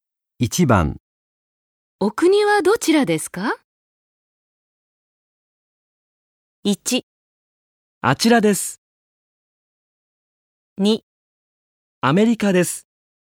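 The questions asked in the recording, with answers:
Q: お国はどちらですか?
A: 2: アメリカです。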